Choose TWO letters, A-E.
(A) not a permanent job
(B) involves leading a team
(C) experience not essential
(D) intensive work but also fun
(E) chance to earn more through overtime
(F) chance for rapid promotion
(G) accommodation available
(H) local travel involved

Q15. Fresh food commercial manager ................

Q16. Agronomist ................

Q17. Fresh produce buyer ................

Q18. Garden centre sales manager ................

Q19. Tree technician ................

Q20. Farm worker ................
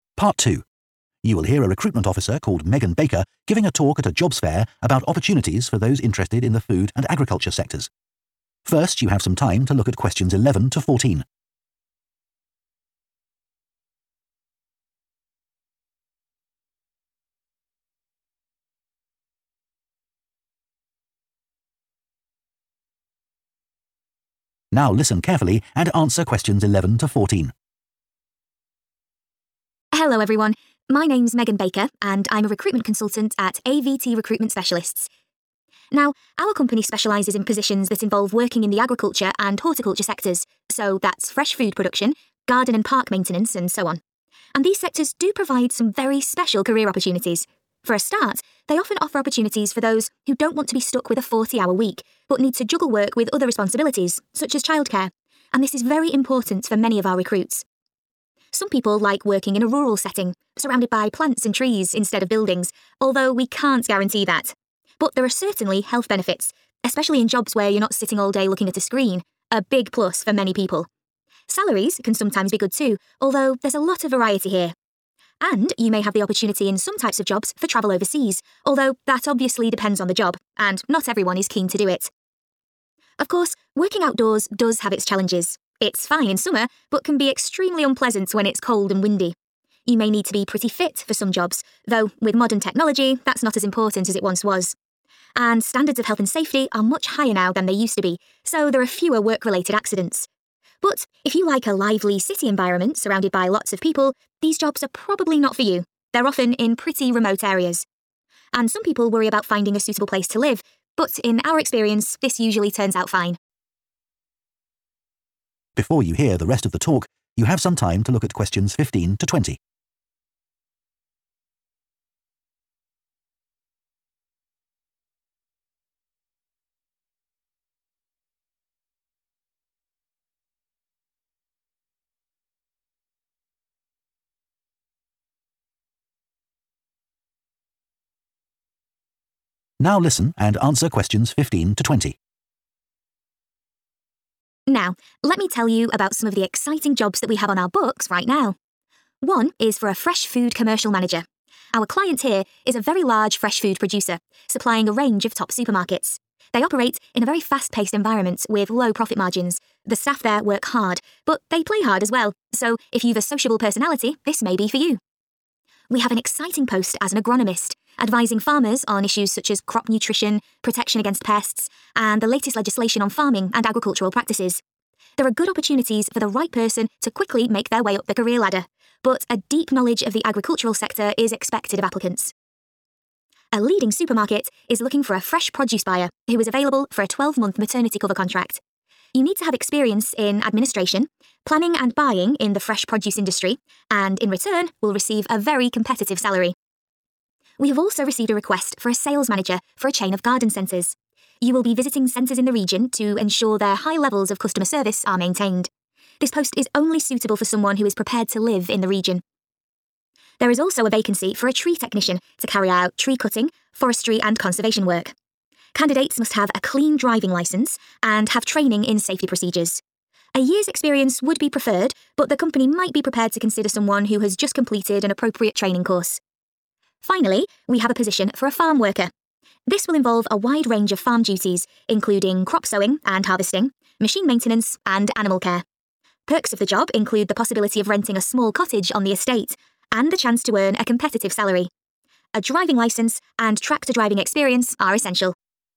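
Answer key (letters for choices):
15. D
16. F
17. A
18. H
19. C
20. G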